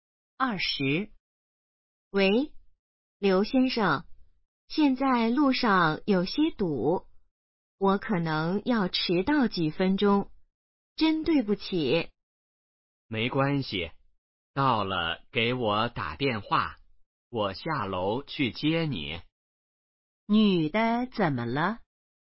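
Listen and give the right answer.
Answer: 可能要迟到几分钟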